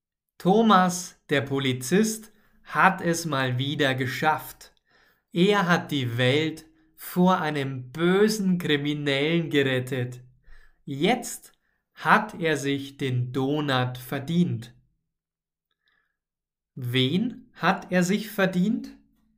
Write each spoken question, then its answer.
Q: hat er sich verdient?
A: Den Donut. Thomas hat sich den Donut verdient.